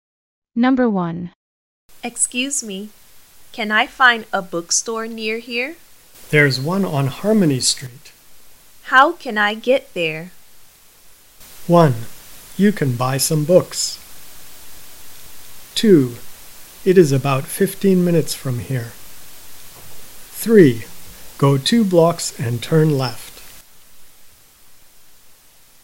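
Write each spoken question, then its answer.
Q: How can I get there?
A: 3: Go 2 blocks and turn left.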